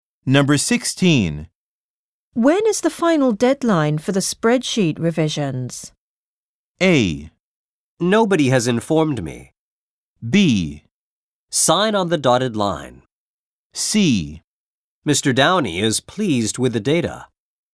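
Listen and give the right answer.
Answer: A: Nobody has informed me.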